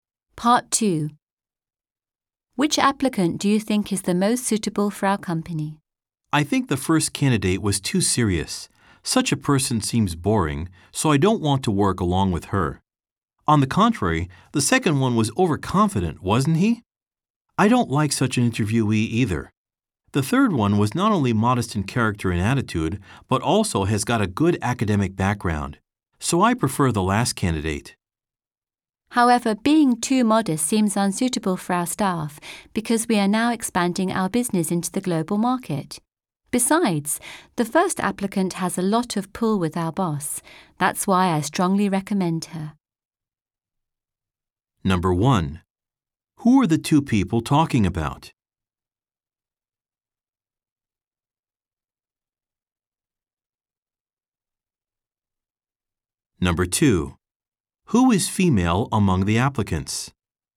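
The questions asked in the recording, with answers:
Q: Who are the two people talking about?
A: Job applicants (candidates) for their company

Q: Who is female among the applicants?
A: The first applicant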